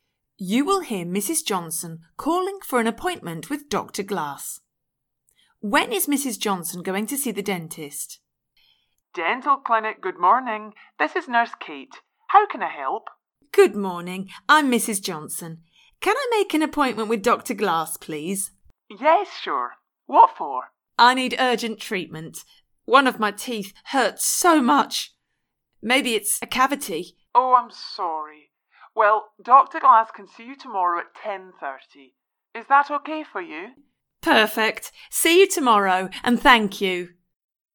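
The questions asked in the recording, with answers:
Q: When is Mrs. Johnson going to see the dentist?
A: Tomorrow at 10:30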